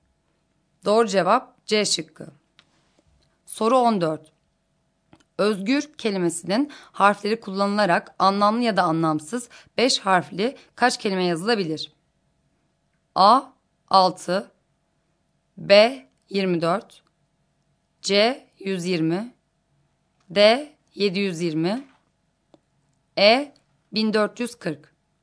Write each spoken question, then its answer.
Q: Özgür kelimesinin harfleri kullanılarak anlamlı ya da anlamsız 5 harfli kaç kelime yazılabilir?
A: Doğru cevap C şıkkı.